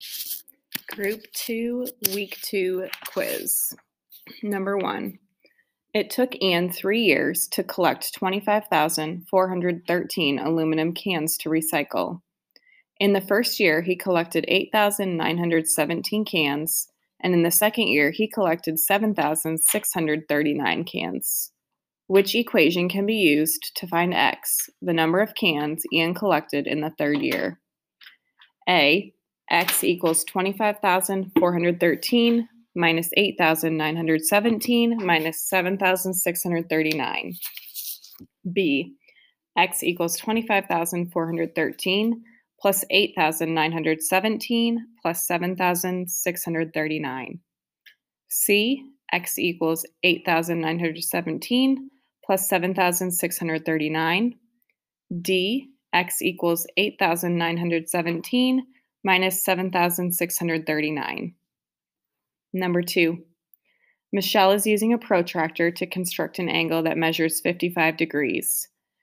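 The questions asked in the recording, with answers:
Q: Which equation can be used to find X, the number of cans Anne collected in the third year?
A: A: X equals 25,413 minus 8,917 minus 7,639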